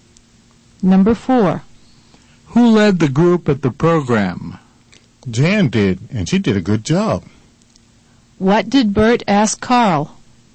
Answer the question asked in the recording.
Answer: He asked Carl who had led the group at the program.